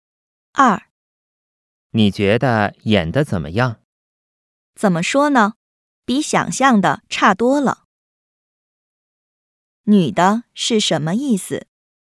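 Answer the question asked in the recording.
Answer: 演得不好,比想象的差多了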